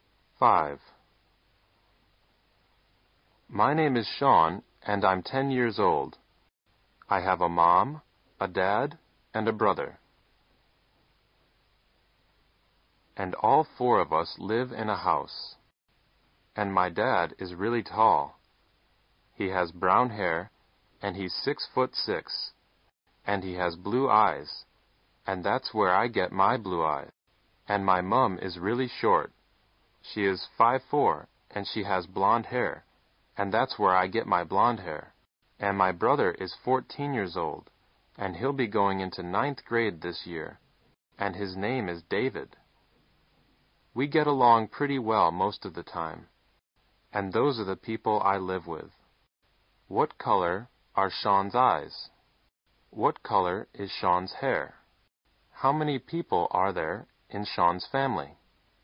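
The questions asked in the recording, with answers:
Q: What color are Sean's eyes?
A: Blue

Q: What color is Sean's hair?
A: Blonde

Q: How many people are there in Sean's family?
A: Four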